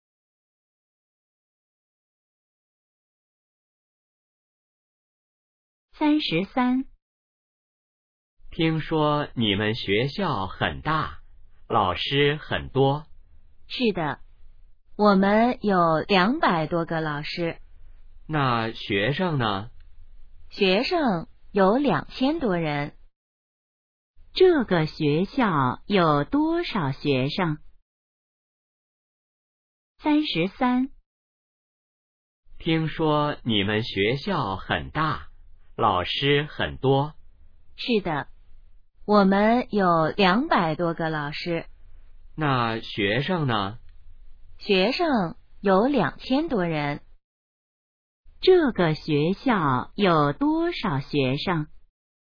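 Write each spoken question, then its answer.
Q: 这个学校有多少学生?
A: 2000多人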